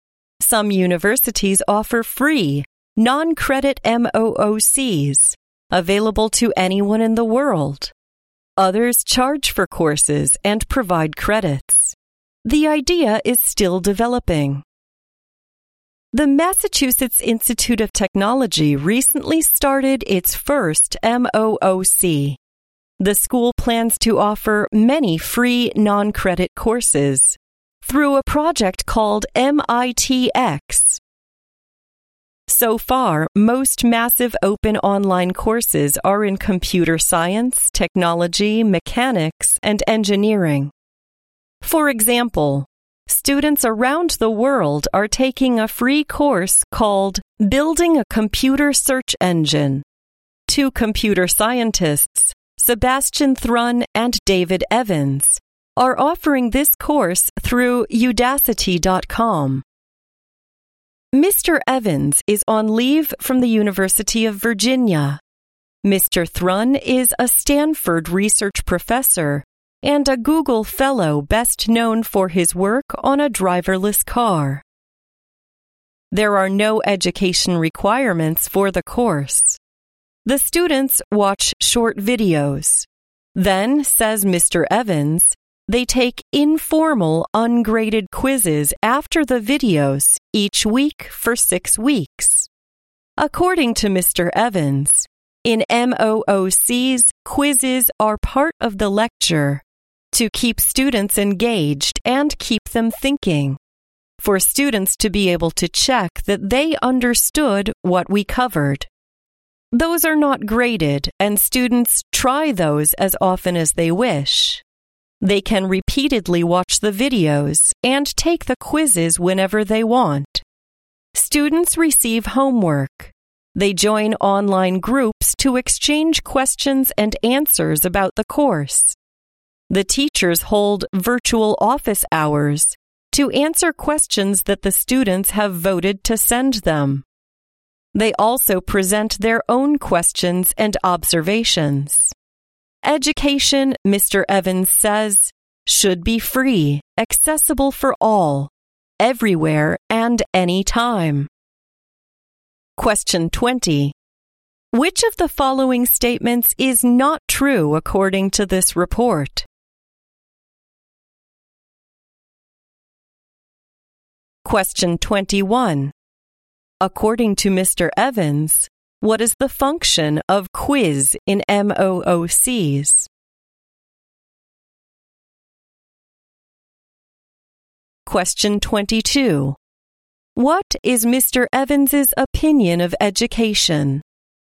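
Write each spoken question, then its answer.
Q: What is Mr. Evans's opinion of education?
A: It should be free and accessible for all, everywhere and anytime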